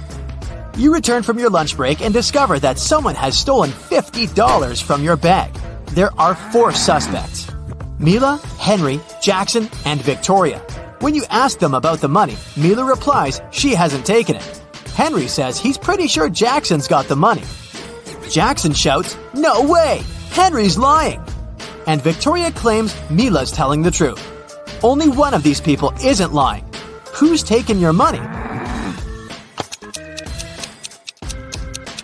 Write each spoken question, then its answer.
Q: Who's taking your money?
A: It's Mila.